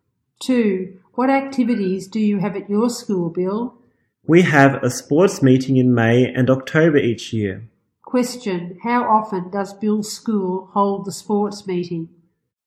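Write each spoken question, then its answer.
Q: How often does Bill's school hold the sports meeting?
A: Twice a year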